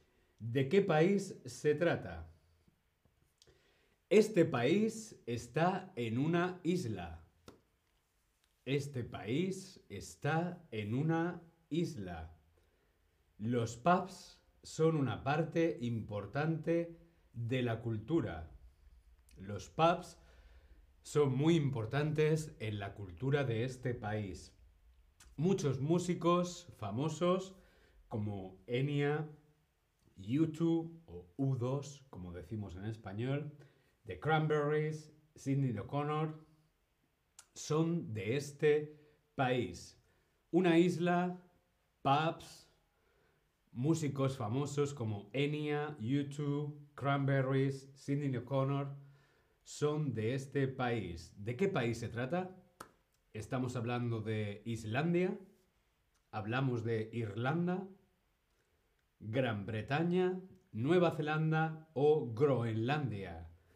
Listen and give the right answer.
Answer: Estamos hablando de Irlanda.